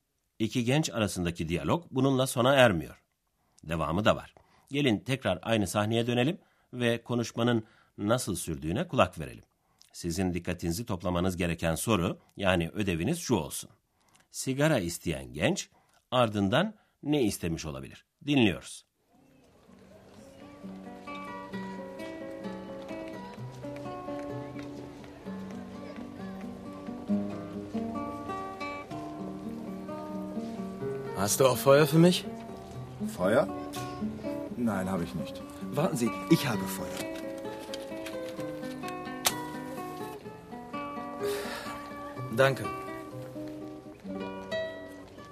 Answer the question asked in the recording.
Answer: sigara içmek isteyen birinin ateşe ihtiyacı vardır.